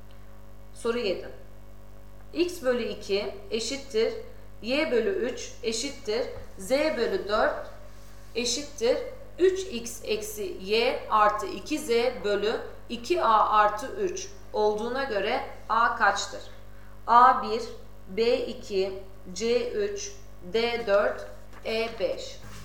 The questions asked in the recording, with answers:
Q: X bölü 2 eşittir Y bölü 3 eşittir Z bölü 4 eşittir 3X eksi Y artı 2Z bölü 2A artı 3 olduğuna göre A kaçtır?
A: Doğru cevap D